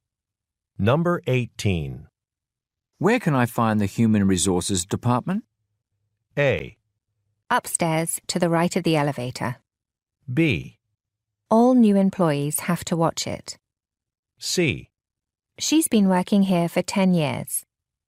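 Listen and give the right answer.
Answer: A: Upstairs, to the right of the elevator.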